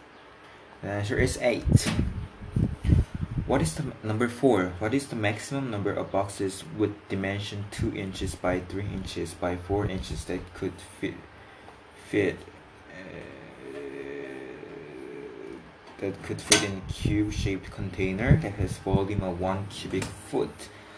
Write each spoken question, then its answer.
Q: What is the maximum number of boxes with dimension 2 inches by 3 inches by 4 inches that could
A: 72.